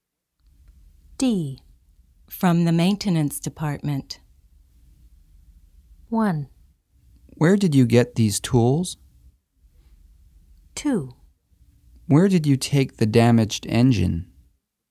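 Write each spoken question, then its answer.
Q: From the maintenance department.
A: 1: Where did you get these tools?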